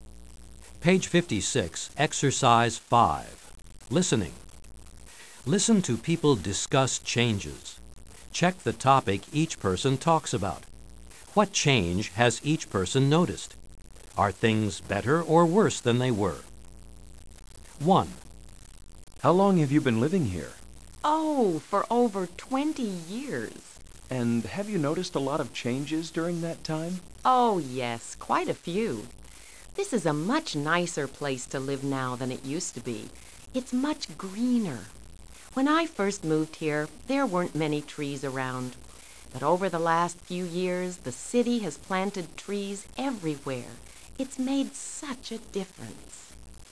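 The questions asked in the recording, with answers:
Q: What change has each person noticed?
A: The city is much greener; the city has planted trees everywhere.

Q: Are things better or worse than they were?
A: Better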